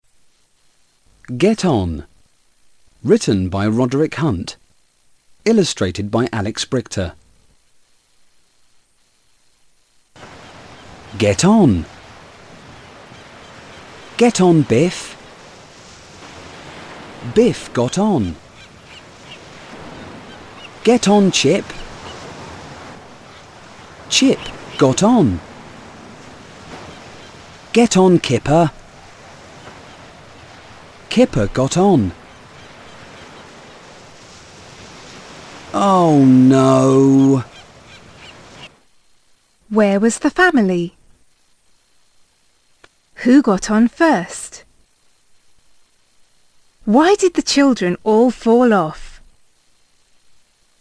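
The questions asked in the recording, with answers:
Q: Who got on first?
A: Biff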